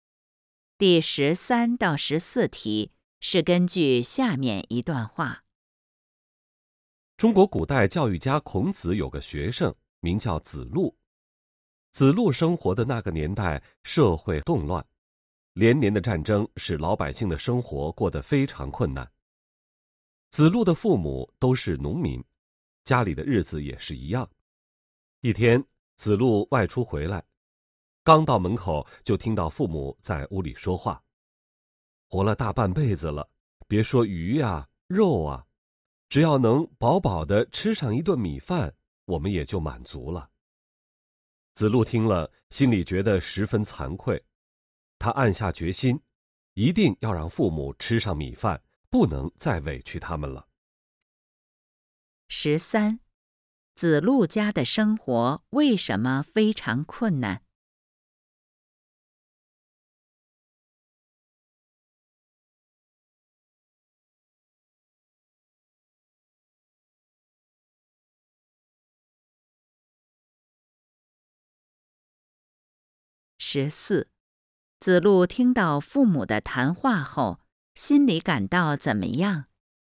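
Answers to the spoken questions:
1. 社会动乱,连年战争
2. 十分惭愧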